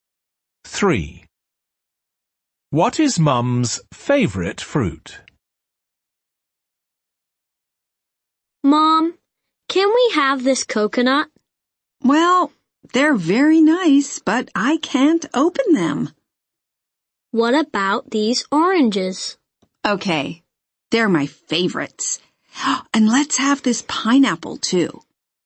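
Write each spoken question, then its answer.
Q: What is Mum's favourite fruit?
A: Oranges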